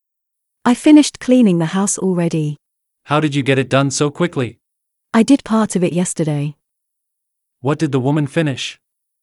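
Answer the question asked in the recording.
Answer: Cleaning the house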